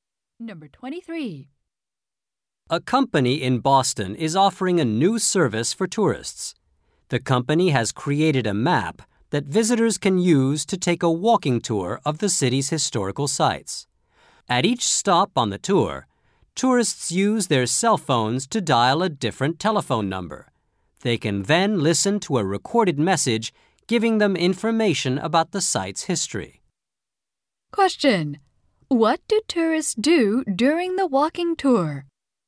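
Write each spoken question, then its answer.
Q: What do tourists do during the walking tour?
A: They call phone numbers to hear recorded information about the sites.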